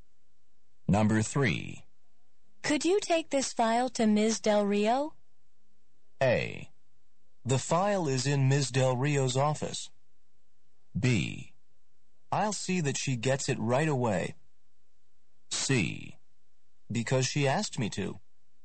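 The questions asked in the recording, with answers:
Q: Could you take this file to Ms. Del Rio?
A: B: I'll see that she gets it right away.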